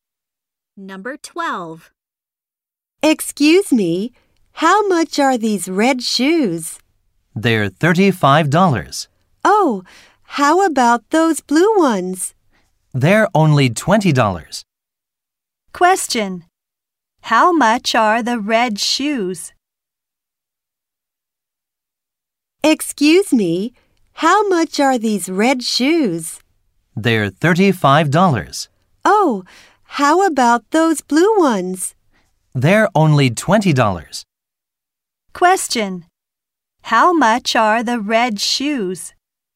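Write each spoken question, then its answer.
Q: How much are the red shoes?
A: $35.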